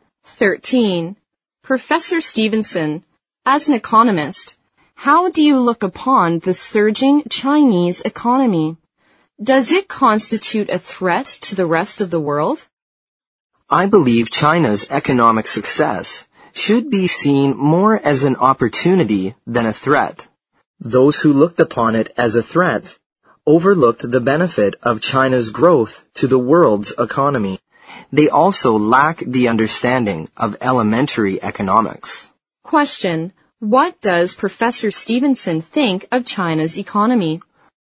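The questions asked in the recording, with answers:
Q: what does Professor Stevenson think of China's economy?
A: Its success is more an opportunity than a threat to the world.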